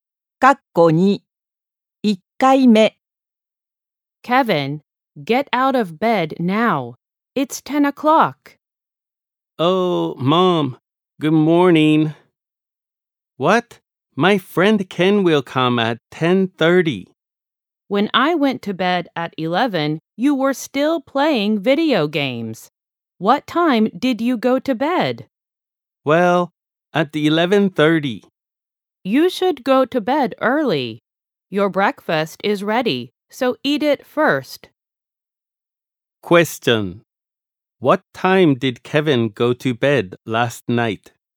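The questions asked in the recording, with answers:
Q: What time did Kevin go to bed last night?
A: At 11:30.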